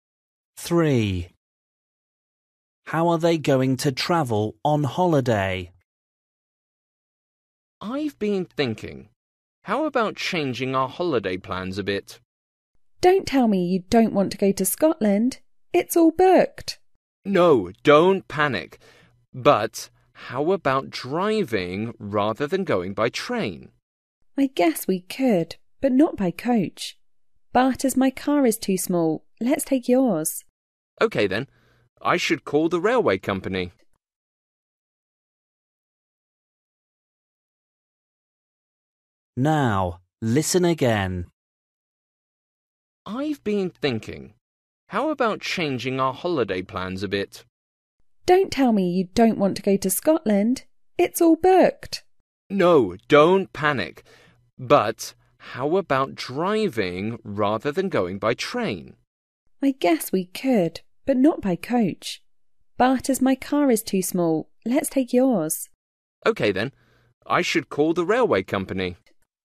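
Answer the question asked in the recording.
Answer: By car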